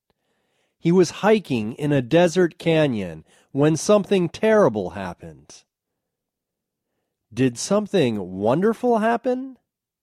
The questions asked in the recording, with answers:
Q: Did something wonderful happen?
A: No, something wonderful didn't happen.